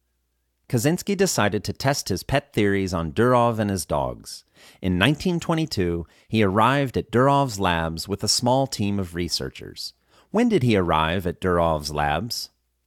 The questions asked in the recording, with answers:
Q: When did he arrive at Durov's labs?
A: He arrived at Durov's labs in 1922.